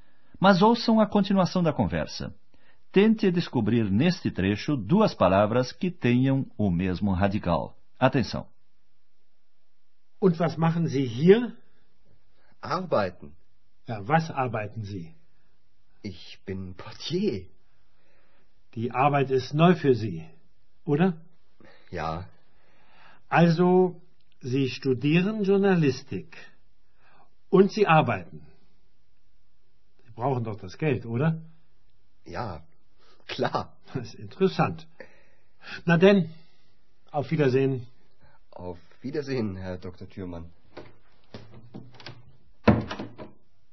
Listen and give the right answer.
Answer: As duas palavras com o mesmo radical são trabalhar e trabalho.